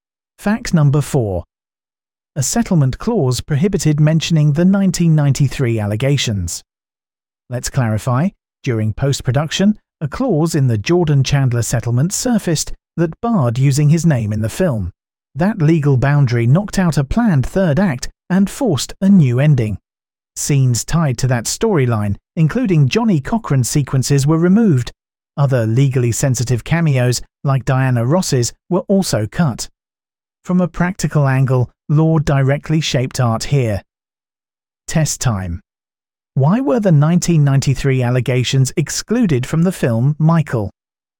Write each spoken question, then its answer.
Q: Why were the 1993 allegations excluded from the film Michael?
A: Correct answer, due to a settlement clause.